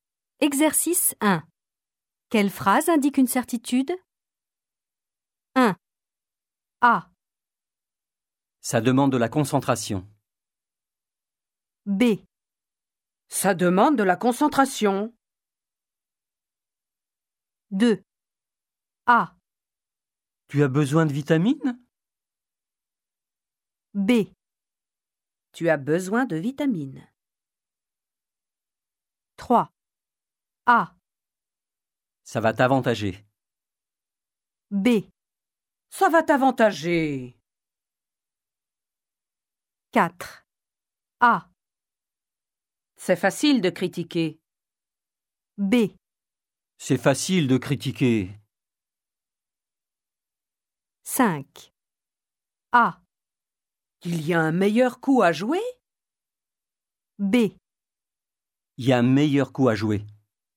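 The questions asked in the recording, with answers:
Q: Quelle phrase indique une certitude?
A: B: Tu as besoin de vitamines.

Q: Quelle phrase indique une certitude?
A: B: Il y a un meilleur coup à jouer.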